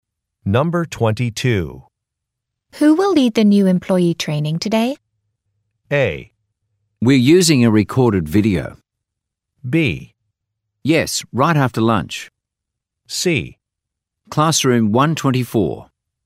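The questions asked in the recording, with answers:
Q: Who will lead the new employee training today?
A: A: We're using a recorded video.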